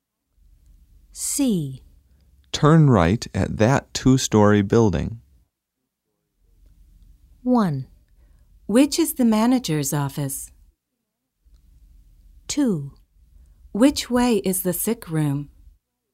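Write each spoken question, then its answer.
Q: Turn right at that two-story building.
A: 2: Which way is the sick room?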